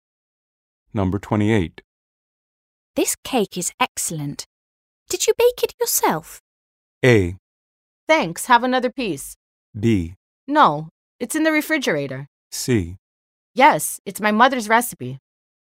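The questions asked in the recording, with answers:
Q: This cake is excellent. Did you bake it yourself?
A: C: Yes, it's my mother's recipe.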